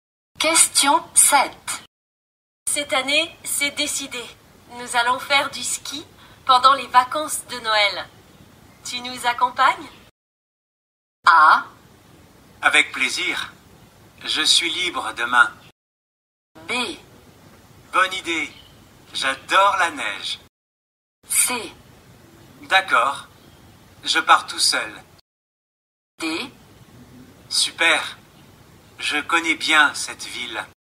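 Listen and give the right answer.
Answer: B: Bonne idée. J'adore la neige.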